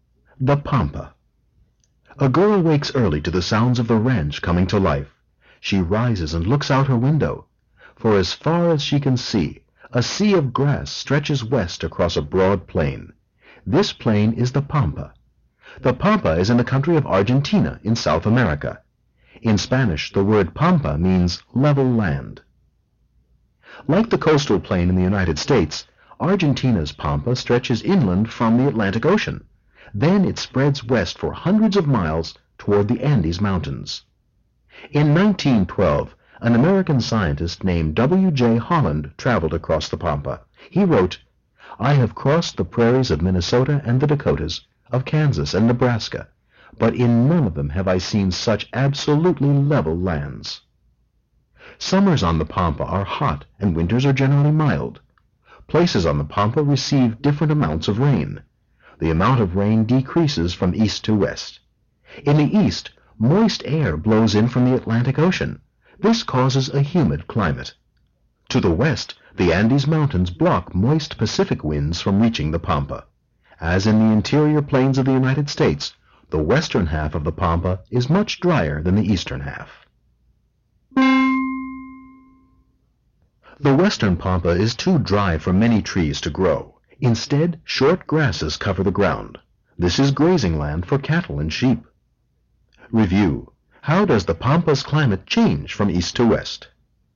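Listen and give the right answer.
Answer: It gets drier from east to west; the east is humid and the west is dry.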